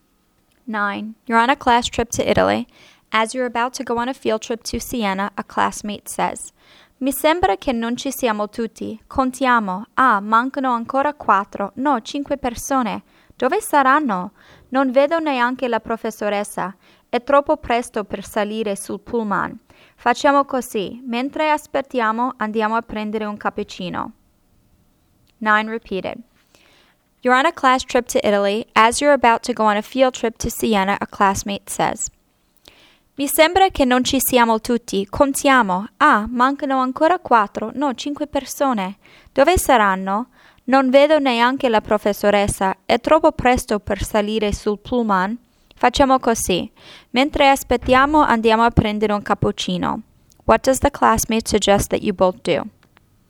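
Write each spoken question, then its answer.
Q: What does the classmate suggest that you both do?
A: Go get a cappuccino while waiting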